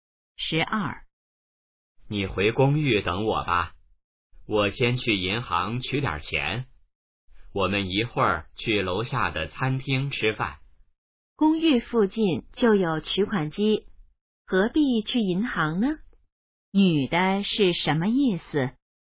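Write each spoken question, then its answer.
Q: 女的是什么意思?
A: 不必去银行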